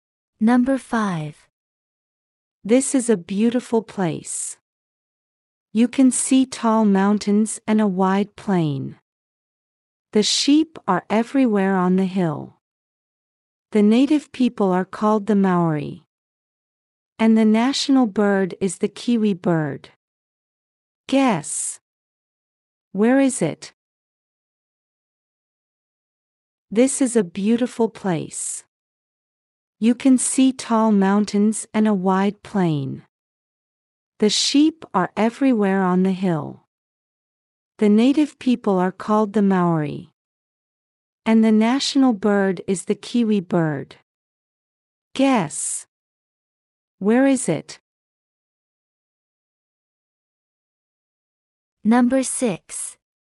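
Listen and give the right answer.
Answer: New Zealand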